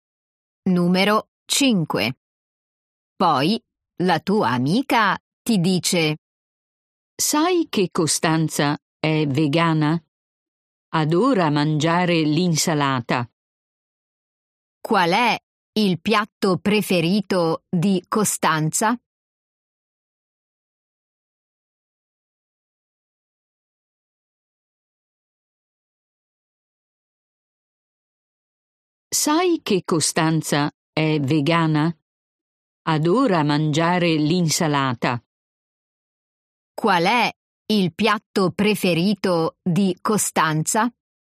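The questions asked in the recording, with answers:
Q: Qual è il piatto preferito di Costanza?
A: L'insalata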